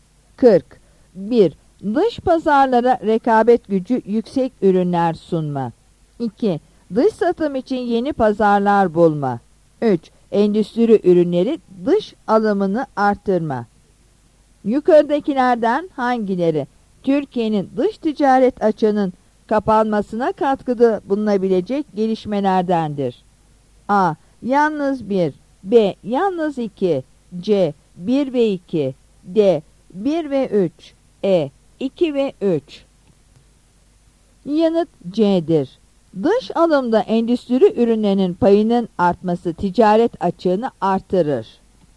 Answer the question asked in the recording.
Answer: Yanıt C'dir.